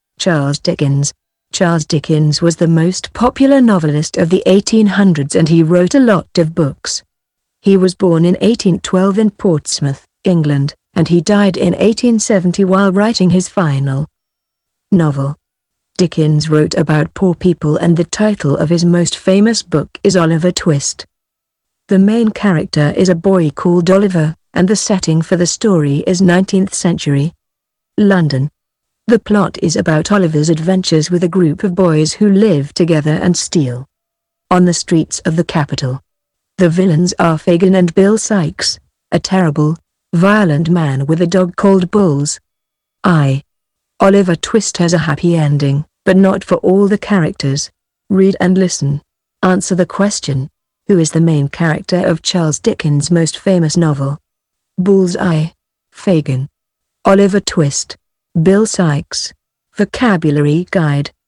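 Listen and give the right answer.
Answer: Oliver Twist (a boy called Oliver)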